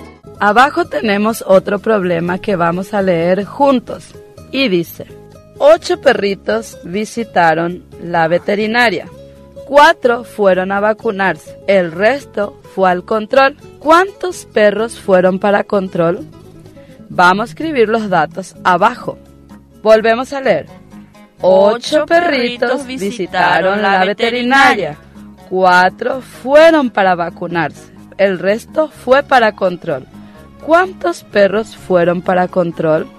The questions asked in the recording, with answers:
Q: ¿Cuántos perros fueron para control?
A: 4 perritos fueron para control.